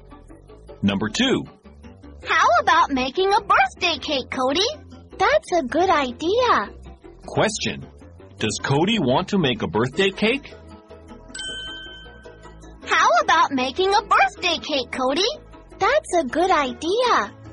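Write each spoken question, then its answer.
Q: Does Cody want to make a birthday cake?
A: Yes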